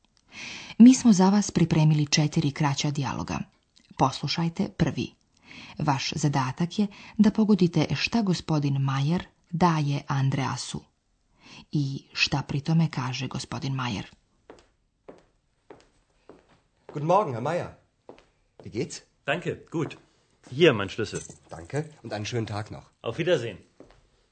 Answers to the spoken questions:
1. Gospodin Majer stavlja svoj ključ na sto
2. i kaže, ovdje je moj ključ.